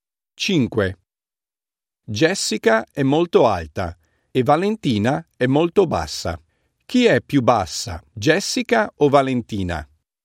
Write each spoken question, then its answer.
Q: Chi è più bassa, Jessica o Valentina?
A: Valentina è più bassa di Jessica.